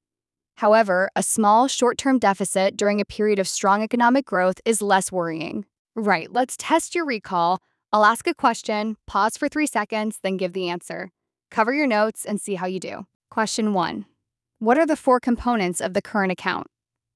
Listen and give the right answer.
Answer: Trade in goods, trade in services, primary income, and secondary income.